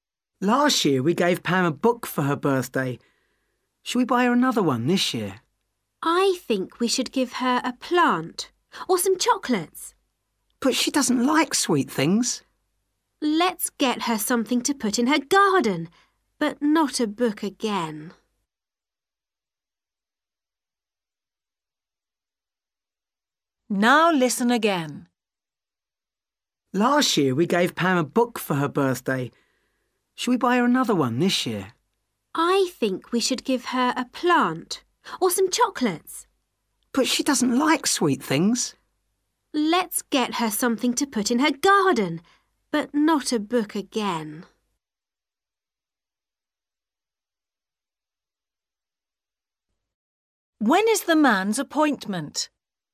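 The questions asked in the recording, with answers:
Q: What are they going to buy for Pam?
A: A plant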